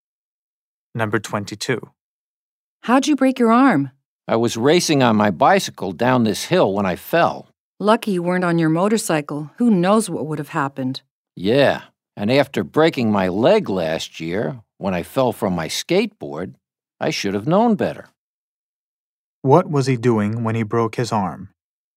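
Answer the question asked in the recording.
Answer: Racing on his bicycle down a hill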